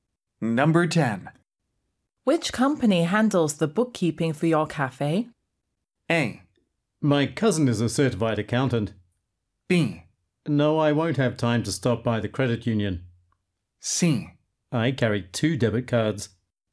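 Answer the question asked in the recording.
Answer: A: My cousin is a certified accountant.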